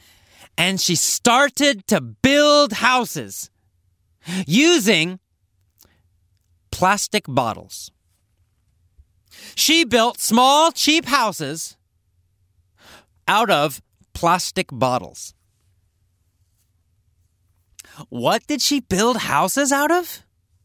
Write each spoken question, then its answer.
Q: What did she build houses out of?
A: Out of plastic bottles. She built houses out of plastic bottles.